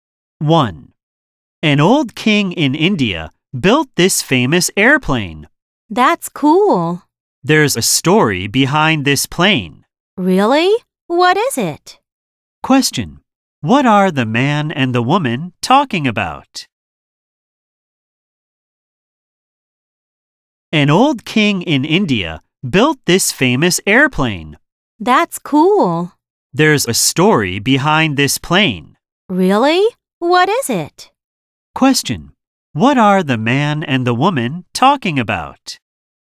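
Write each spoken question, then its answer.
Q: What are the man and the woman talking about?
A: A famous airplane built by an old king in India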